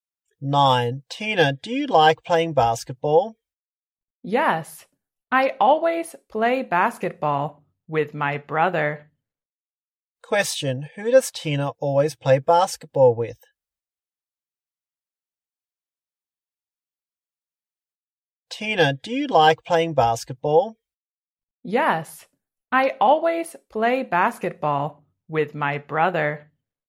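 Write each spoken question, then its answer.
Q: Who does Tina always play basketball with?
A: Her brother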